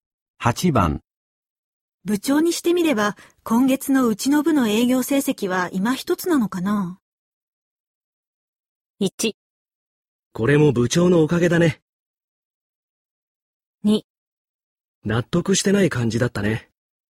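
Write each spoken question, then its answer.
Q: 部長にしてみれば今月のうちの部の営業成績は今一つなのかな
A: 2: 納得してない感じだったね。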